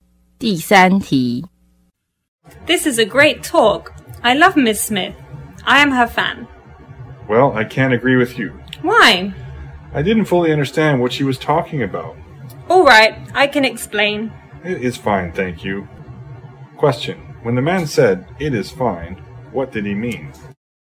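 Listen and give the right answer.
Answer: He doesn't need her to explain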